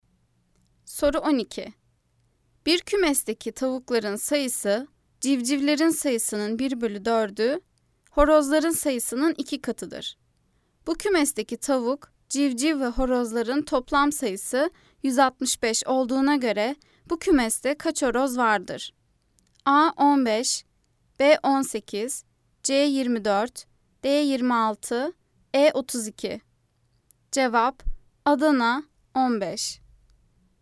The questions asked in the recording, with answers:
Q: Bu kümesteki tavuk, civciv ve horozların toplam sayısı 165 olduğuna göre bu kümeste kaç horoz vardır?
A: Cevap Adana 15.